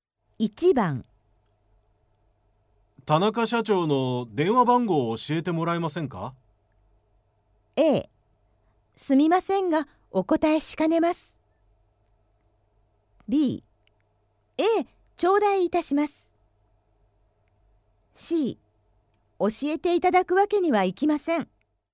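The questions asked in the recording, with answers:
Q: 田中社長の電話番号を教えてもらえませんか?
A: A: すみませんがお答えしかねます。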